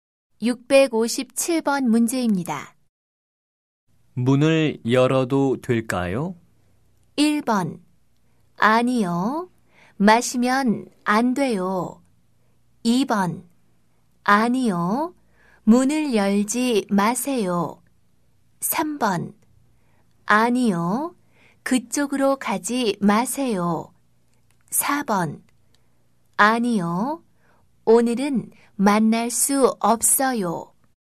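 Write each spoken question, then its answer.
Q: 문을 열어도 될까요?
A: 2: 아니요. 문을 열지 마세요.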